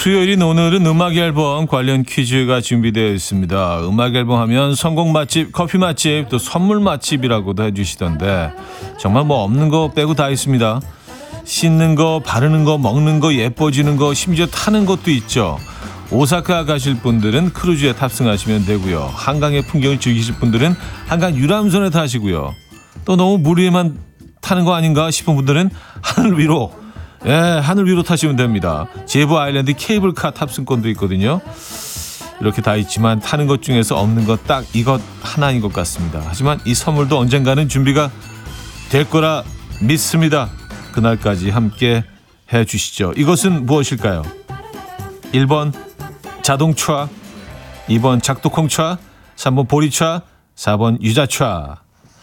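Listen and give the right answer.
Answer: 1: 자동차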